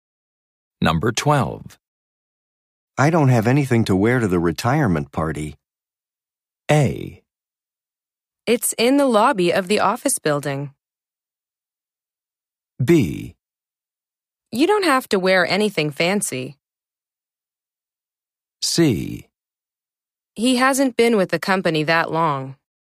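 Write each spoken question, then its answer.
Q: I don't have anything to wear to the retirement party.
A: B: You don't have to wear anything fancy.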